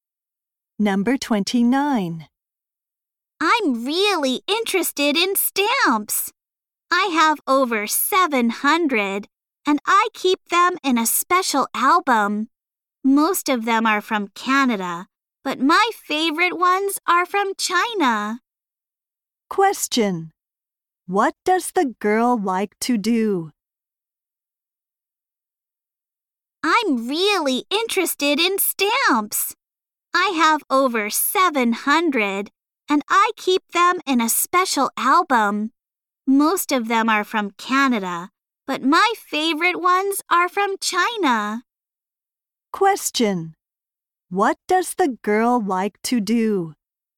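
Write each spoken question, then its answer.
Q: What does the girl like to do?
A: Collect stamps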